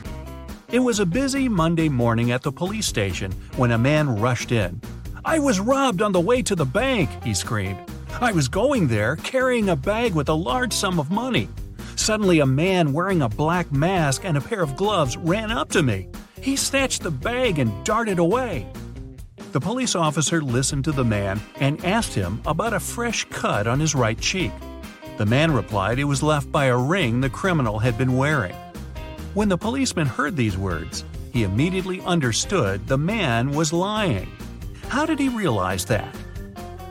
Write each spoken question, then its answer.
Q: How did he realize that?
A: The man said the robber had been wearing gloves.